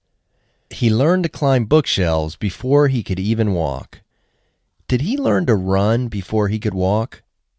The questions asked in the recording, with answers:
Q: Did he learn to run before he could walk?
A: No, he didn't learn to run before he could walk.